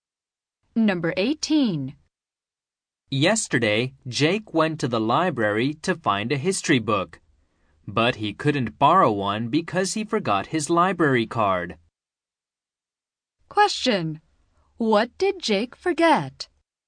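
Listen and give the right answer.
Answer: His library card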